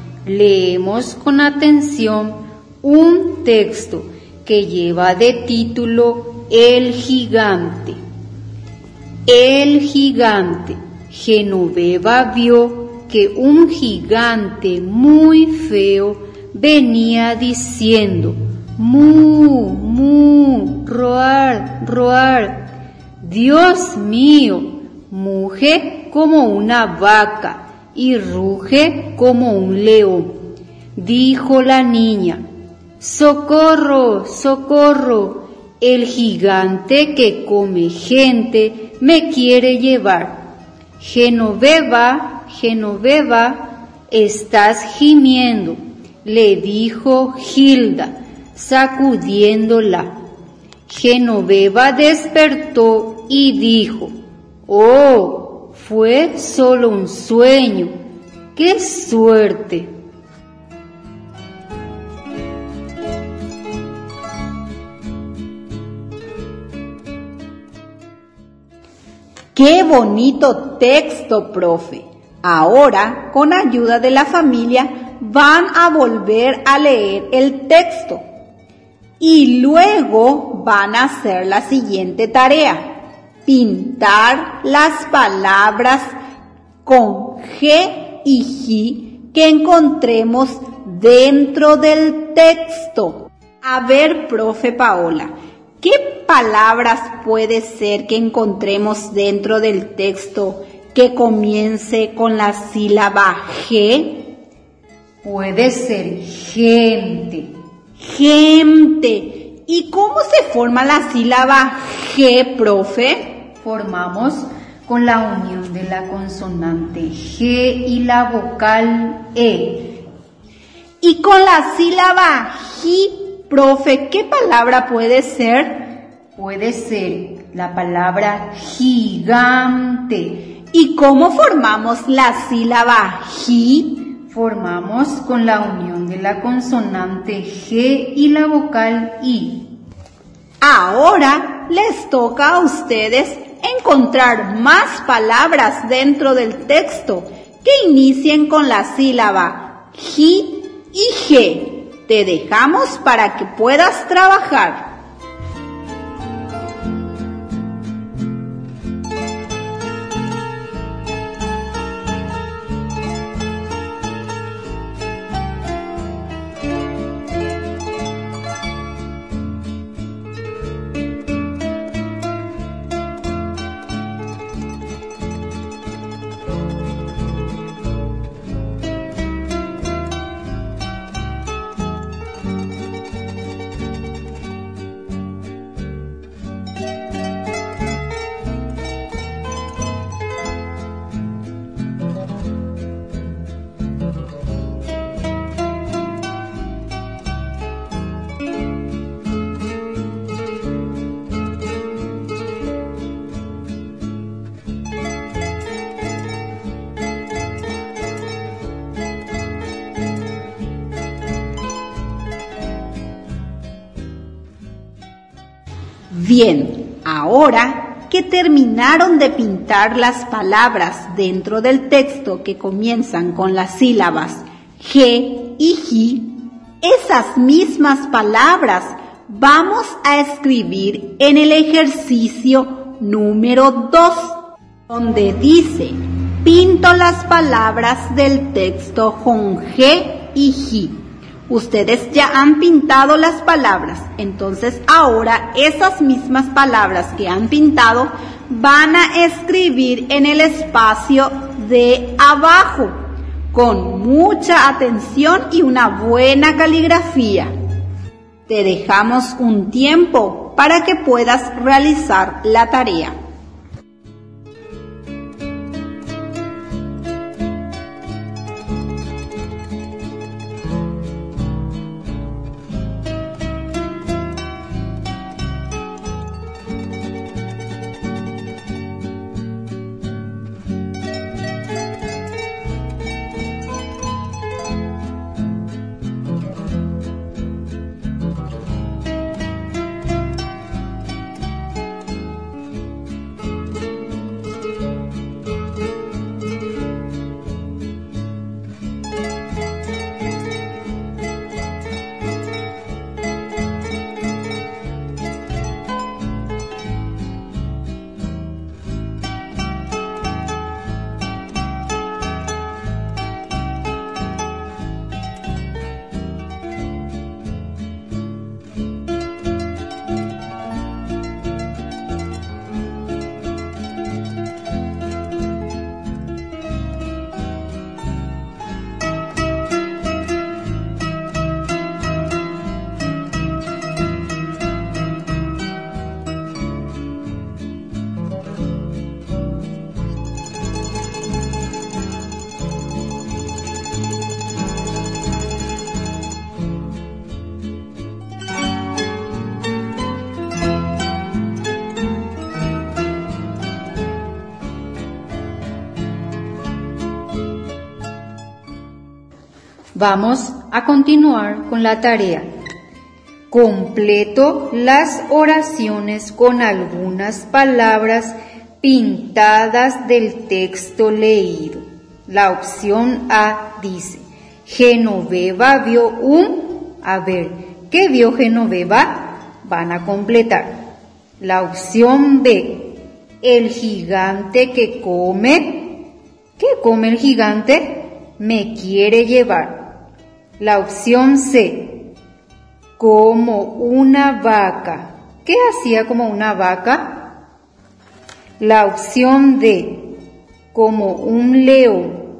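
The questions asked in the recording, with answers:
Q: A ver, ¿qué vio Genoveva?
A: un gigante (muy feo)

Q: ¿Qué come el gigante?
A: gente

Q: ¿Qué hacía como una vaca?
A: muge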